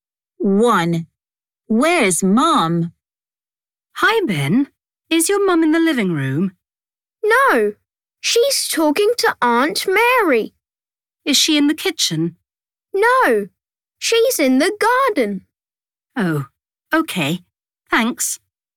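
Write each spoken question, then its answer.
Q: Where's Mum?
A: In the garden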